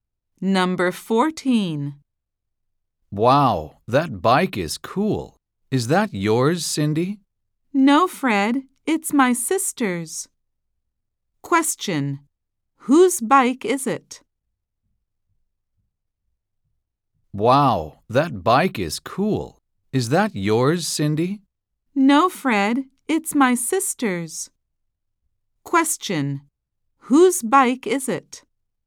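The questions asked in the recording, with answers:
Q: Whose bike is it?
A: Cindy's sister's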